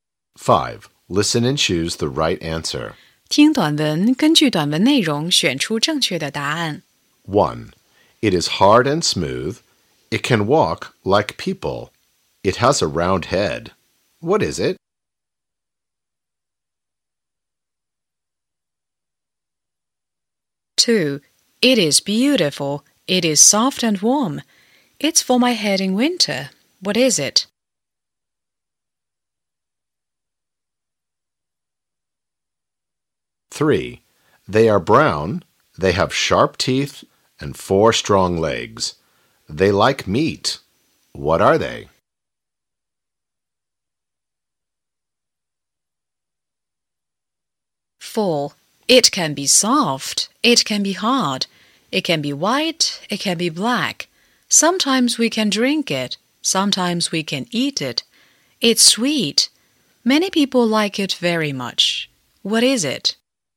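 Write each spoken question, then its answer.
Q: What is it?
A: a hat

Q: What is it?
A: chocolate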